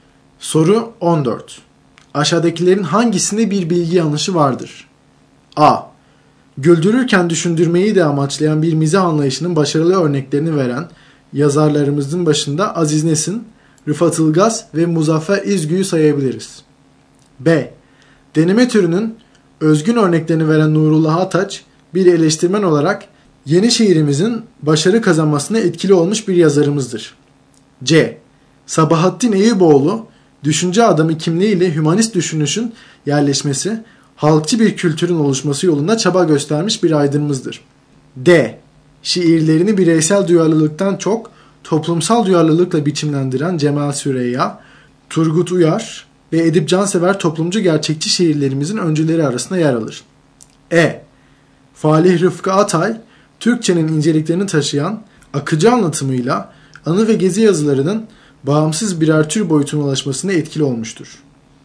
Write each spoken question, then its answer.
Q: Aşağıdakilerin hangisinde bir bilgi yanlışı vardır?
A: Doğru yanıt D şıkkı.